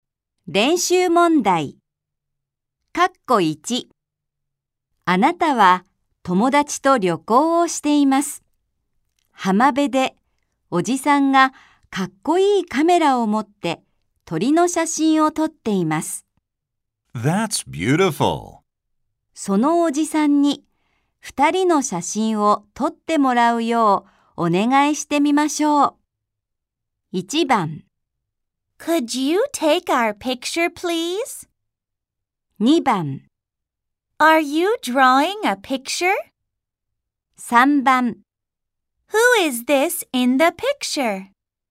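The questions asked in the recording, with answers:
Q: そのおじさんに二人の写真を撮ってもらうようお願いしてみましょう。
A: 1: Could you take our picture, please?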